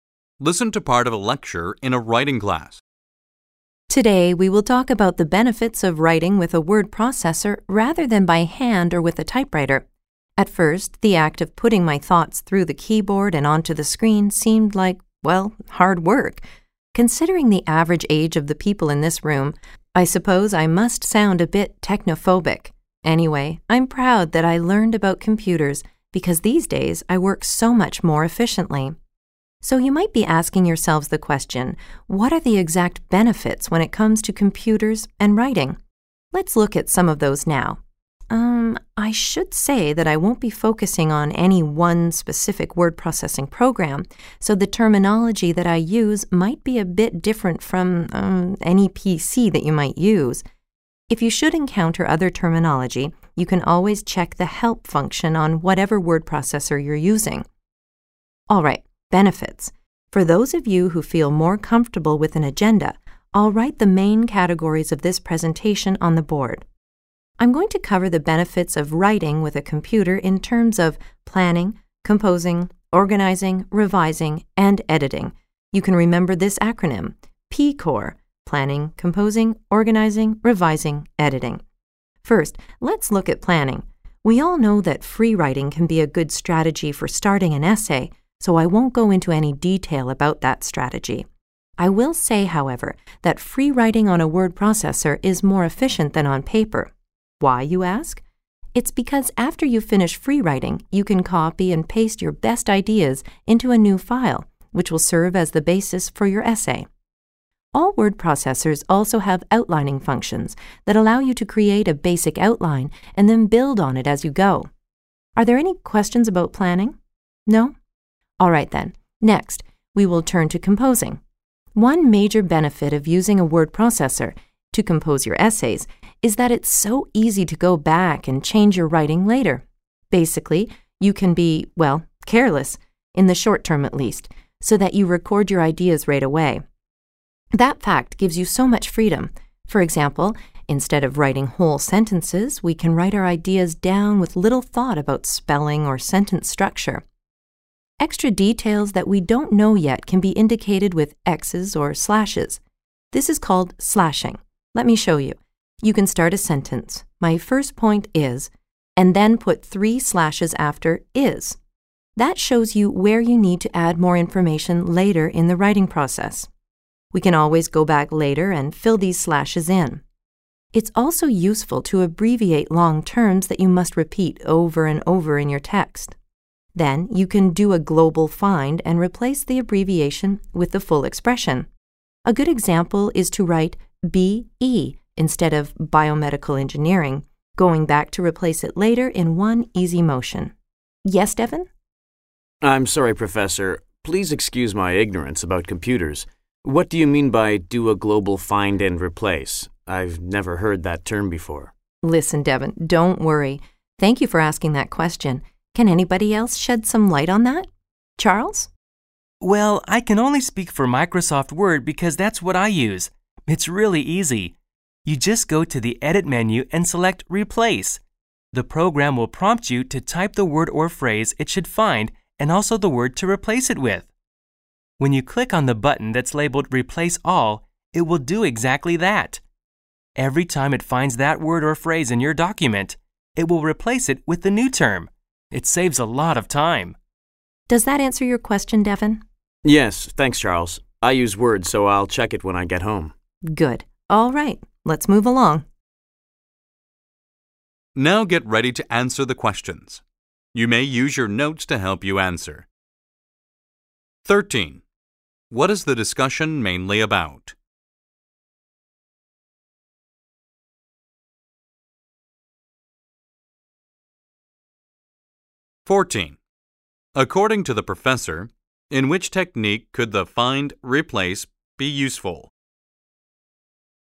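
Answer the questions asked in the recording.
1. The benefits of writing with a word processor
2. Abbreviating long terms that are repeated, then replacing them with the full expression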